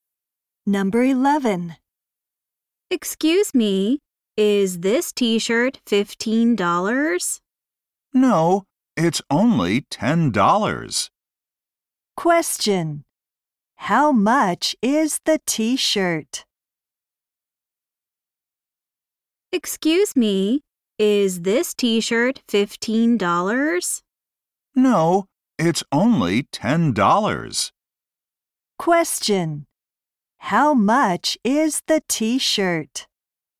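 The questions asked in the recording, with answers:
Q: How much is the t-shirt?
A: $10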